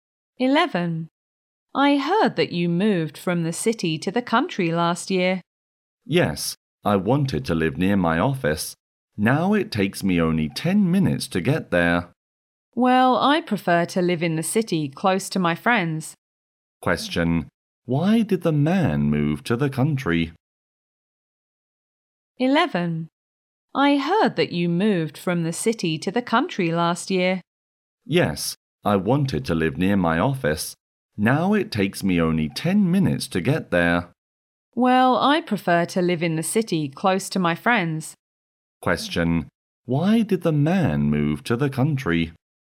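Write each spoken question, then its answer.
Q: Why did the man move to the country?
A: To live near his office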